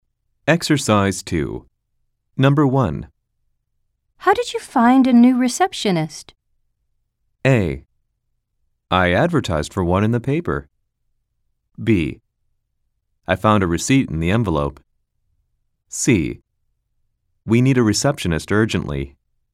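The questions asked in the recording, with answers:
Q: How did you find a new receptionist?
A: A: I advertised for one in the paper.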